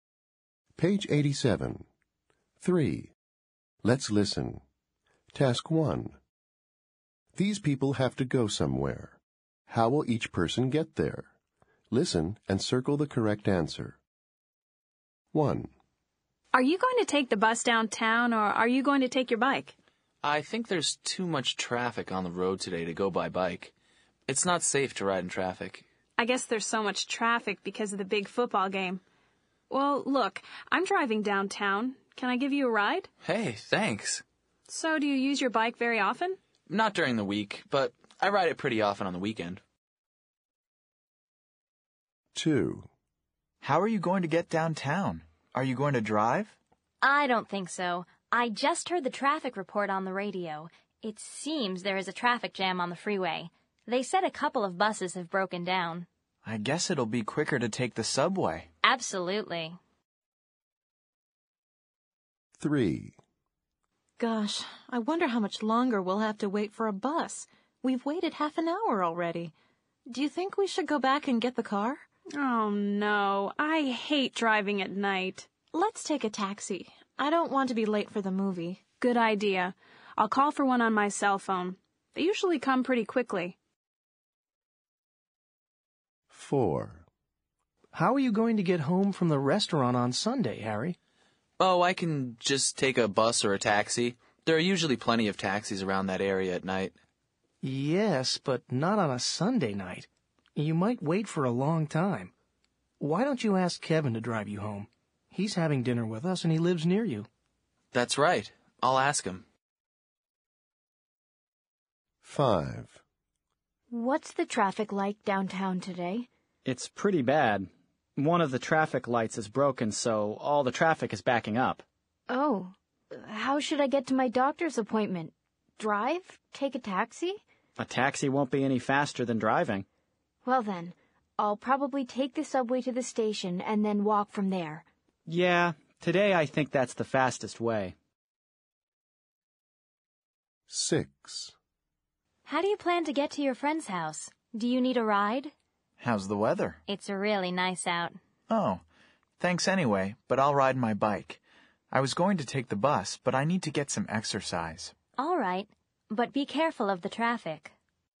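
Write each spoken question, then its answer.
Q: How will each person get there?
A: By car (a friend gives a ride)

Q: How will each person get there?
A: By subway

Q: How will each person get there?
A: By taxi

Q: How will each person get there?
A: By car (Kevin drives him)

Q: How will each person get there?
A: By subway, then walk

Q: How will each person get there?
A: By bike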